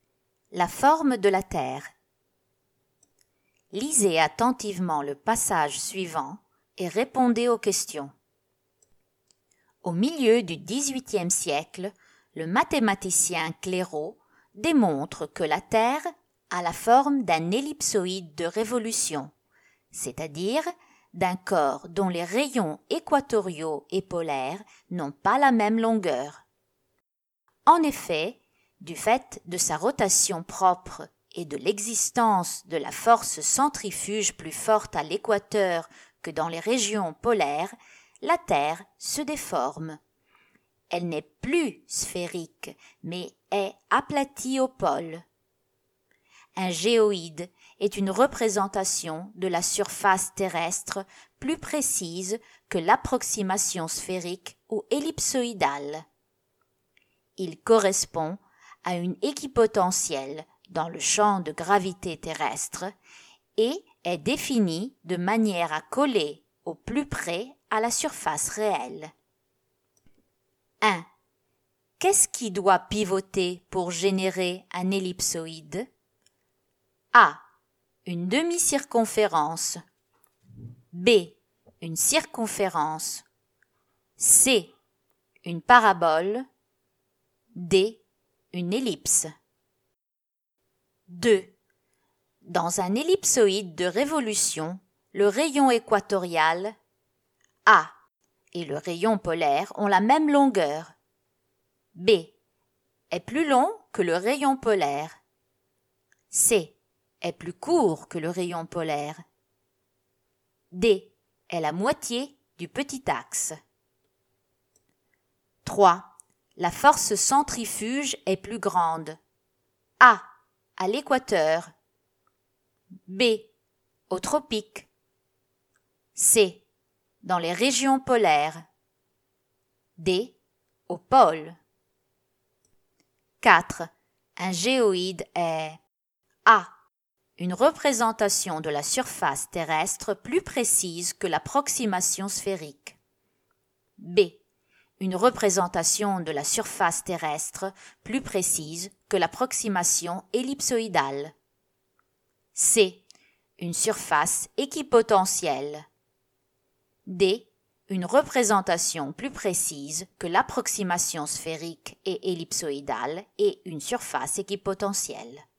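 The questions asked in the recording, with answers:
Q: Dans un ellipsoïde de révolution, le rayon équatorial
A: B: est plus long que le rayon polaire.

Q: La force centrifuge est plus grande.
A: A: À l'équateur.

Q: Un géoïde est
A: D: Une représentation plus précise que l'approximation sphérique et ellipsoïdale et une surface équipotentielle.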